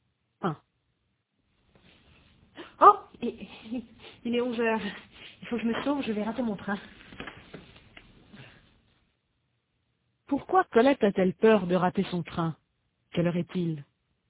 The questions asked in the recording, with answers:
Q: Quelle heure est-il?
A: Il est 11h.